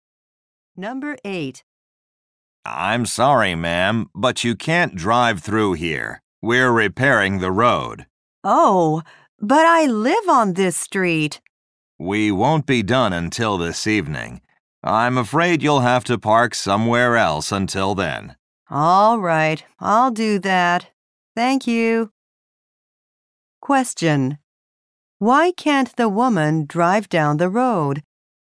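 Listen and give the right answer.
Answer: The road is being repaired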